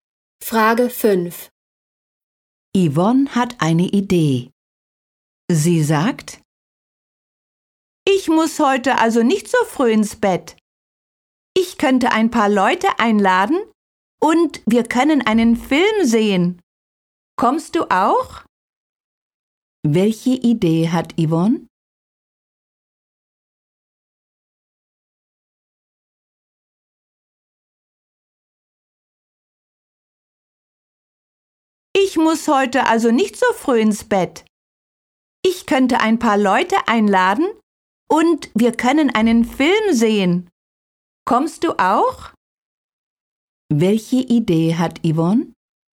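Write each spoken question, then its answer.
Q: Welche Idee hat Yvonne?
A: Freunde einladen und einen Film sehen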